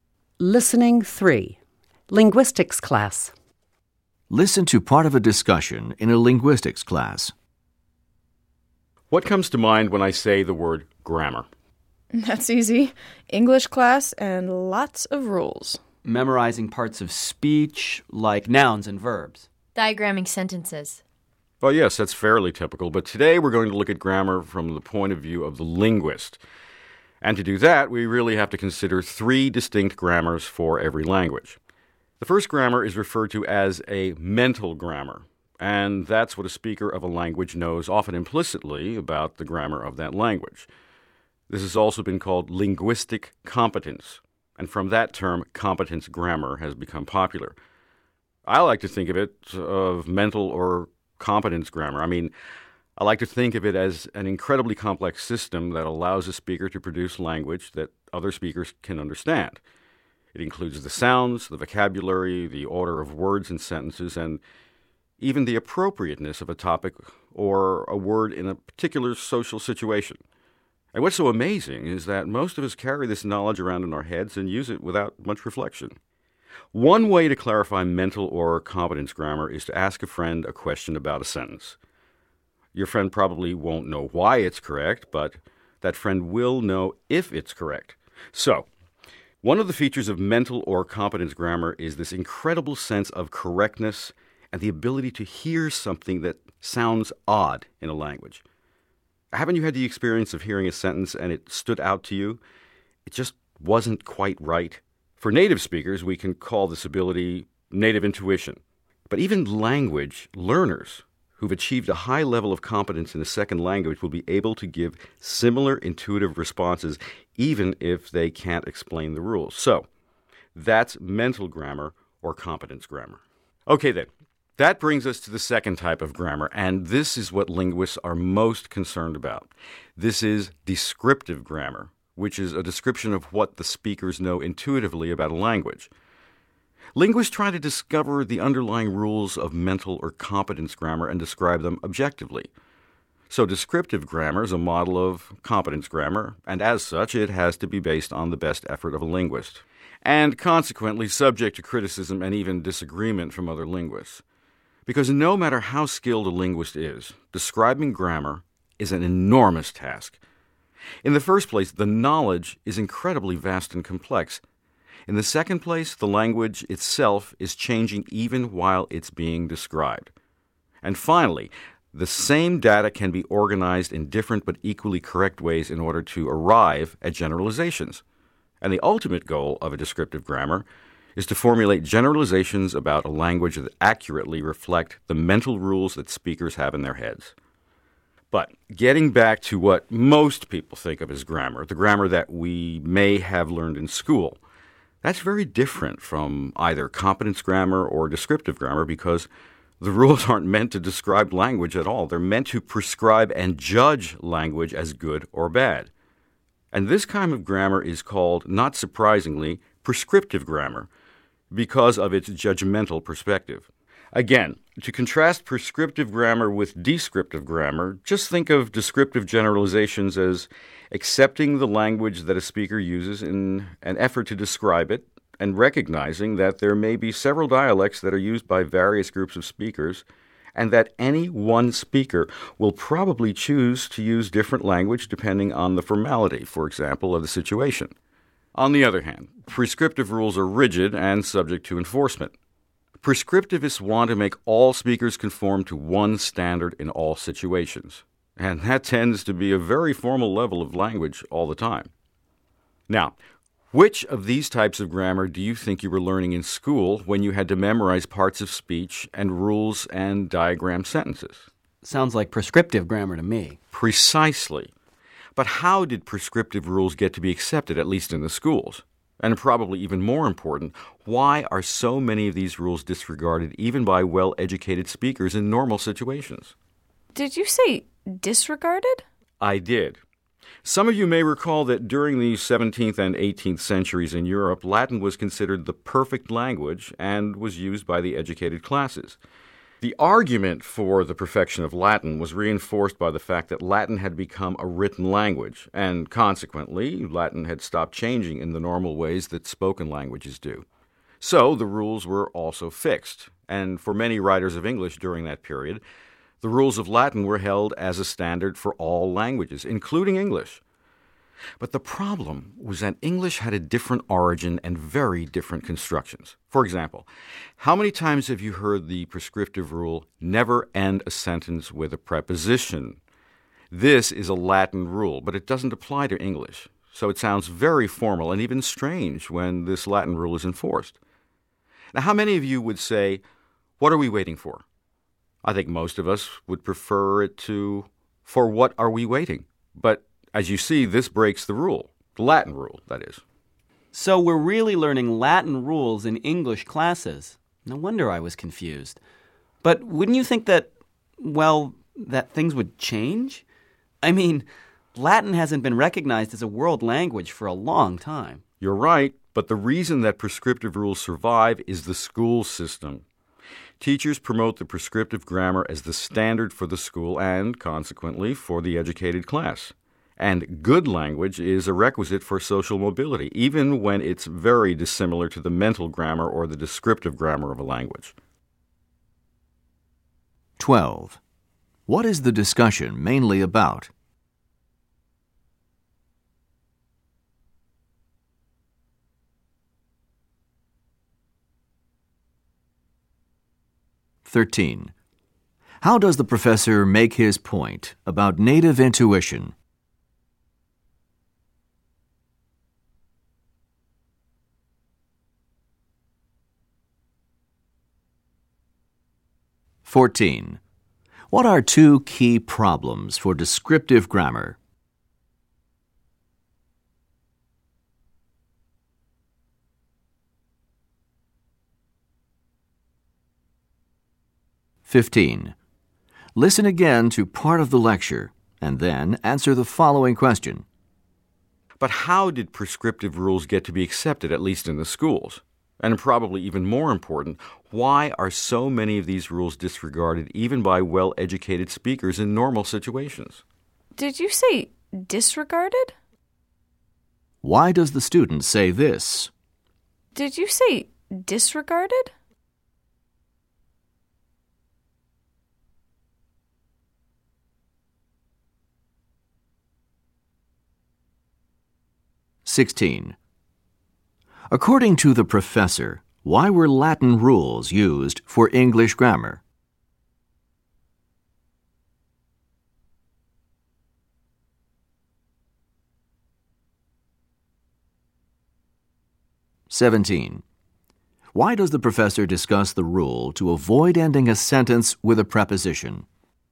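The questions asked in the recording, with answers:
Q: What is the discussion mainly about?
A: Three types of grammar: mental (competence), descriptive and prescriptive

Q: What are two key problems for descriptive grammar?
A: The knowledge is vast and complex, and the language keeps changing while it is being described

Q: According to the professor, why were Latin rules used for English grammar?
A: Latin was considered the perfect language and was used as a standard for all languages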